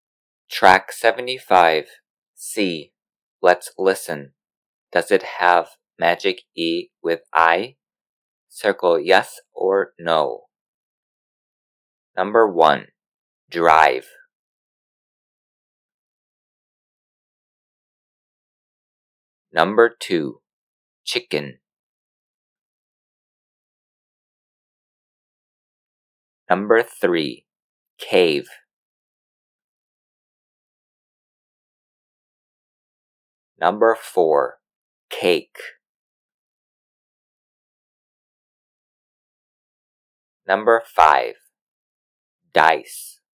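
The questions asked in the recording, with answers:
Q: Drive.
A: yes

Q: Chicken.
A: no

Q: Cave.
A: no

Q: cake.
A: no

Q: dice.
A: yes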